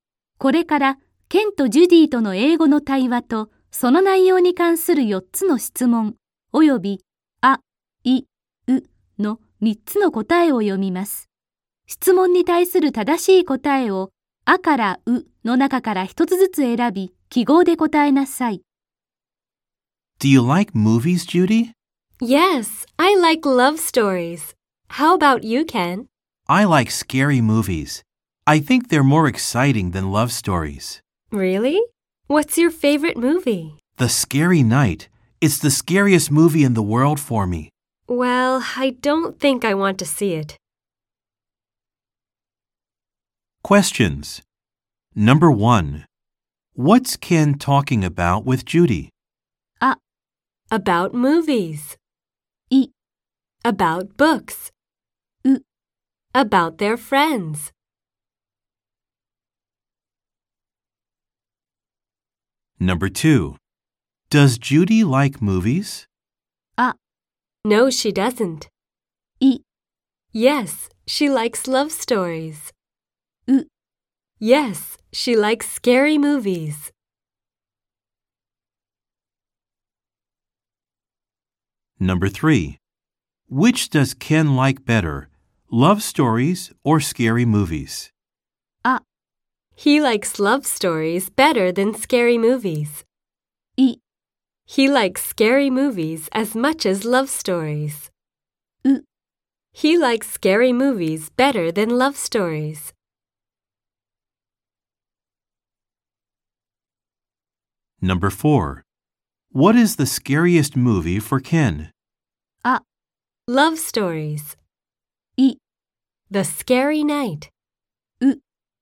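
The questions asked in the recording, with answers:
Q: What's Ken talking about with Judy?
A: ア: About movies.

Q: Does Judy like movies?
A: イ: Yes, she likes love stories.

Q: Which does Ken like better?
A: ウ: He likes scary movies better than love stories.

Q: What is the scariest movie for Ken?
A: イ: The Scary Night.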